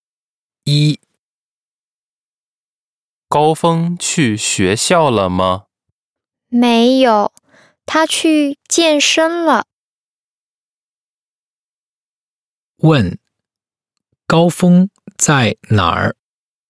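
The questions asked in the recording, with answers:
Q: 高峰在哪儿?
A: 在健身房(他去健身了)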